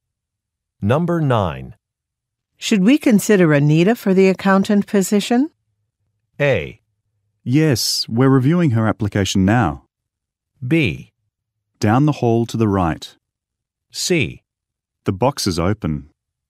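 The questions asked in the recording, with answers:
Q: Should we consider Anita for the accountant position?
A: A: Yes, we're reviewing her application now.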